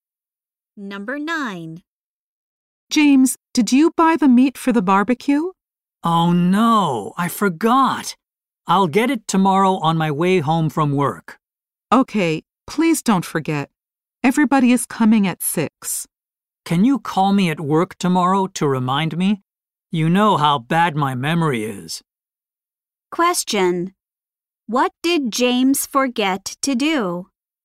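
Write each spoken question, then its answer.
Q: What did James forget to do?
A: Buy the meat for the barbecue.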